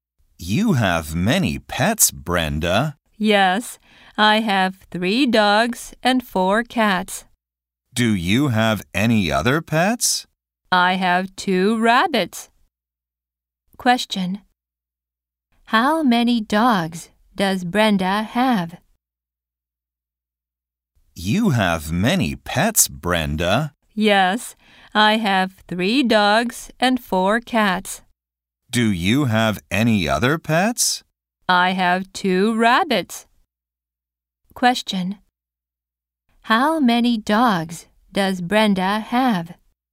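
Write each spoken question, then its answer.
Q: How many dogs does Brenda have?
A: Three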